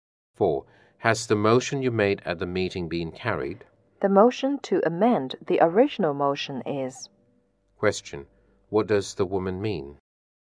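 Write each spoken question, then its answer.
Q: What does the woman mean?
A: Only the motion to amend the original motion has been carried.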